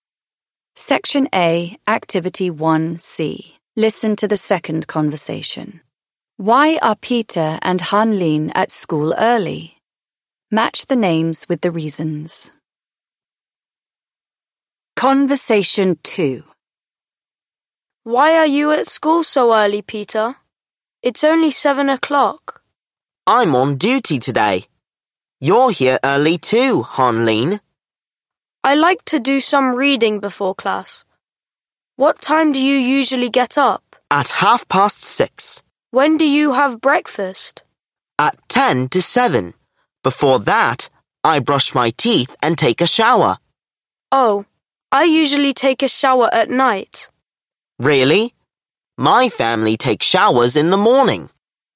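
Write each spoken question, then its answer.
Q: Why are Peter and Hanlin at school early?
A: Peter is on duty today; Hanlin likes to do some reading before class.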